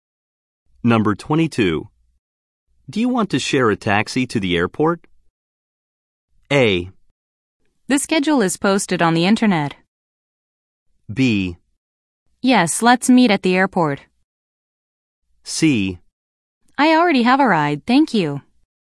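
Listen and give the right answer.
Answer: C: I already have a ride, thank you.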